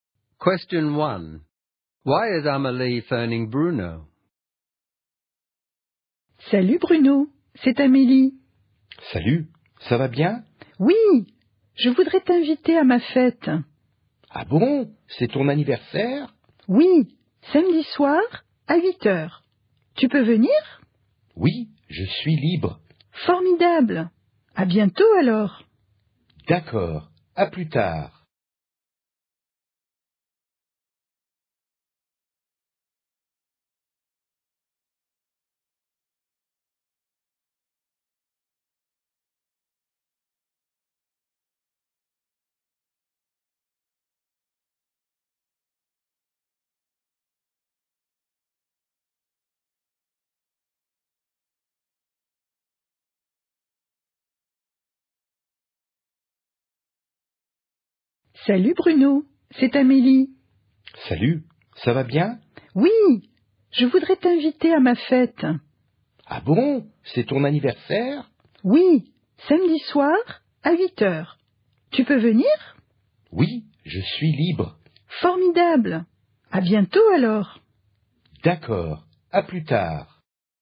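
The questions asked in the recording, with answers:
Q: Why is Amélie phoning Bruno?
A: To invite him to her birthday party on Saturday at 8 pm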